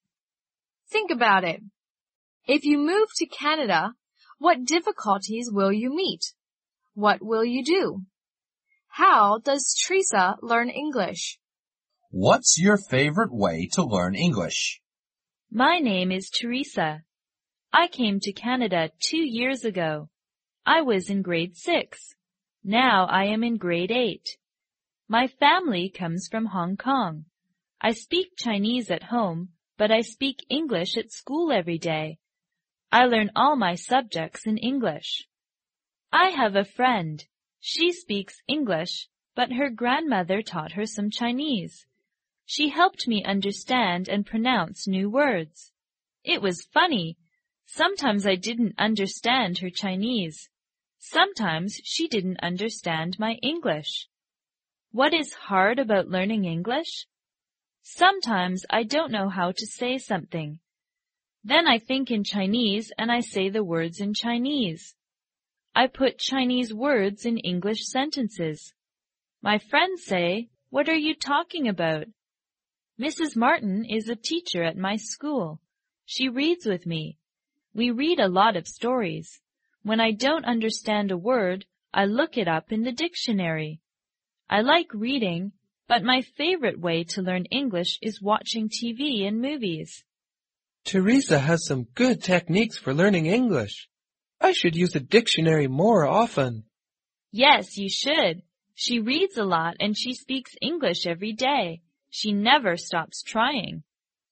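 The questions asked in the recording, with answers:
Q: How does Teresa learn English?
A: She speaks English at school every day, reads stories with her teacher, looks up words in a dictionary, and watches TV and movies.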